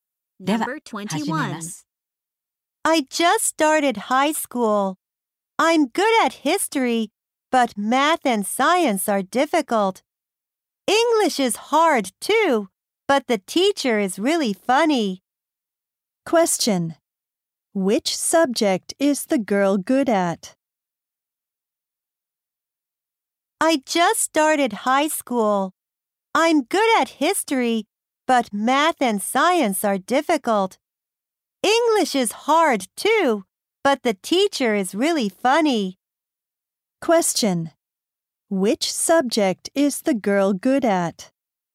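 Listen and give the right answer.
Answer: History.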